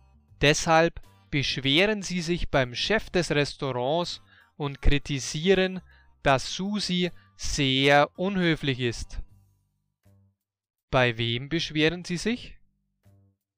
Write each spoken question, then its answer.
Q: Bei wem beschweren Sie sich?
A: Beim Chef des Restaurants.